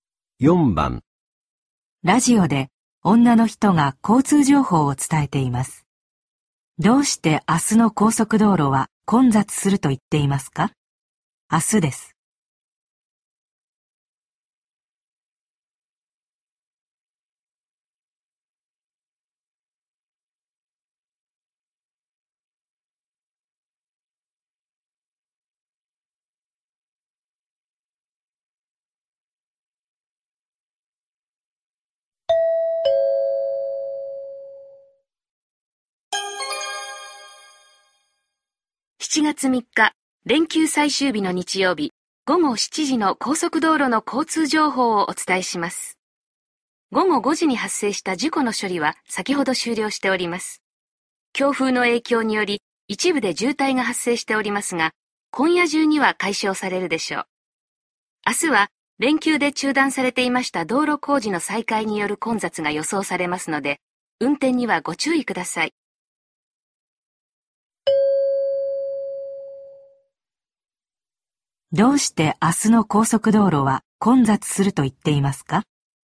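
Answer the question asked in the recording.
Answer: 道路工事が再開されるから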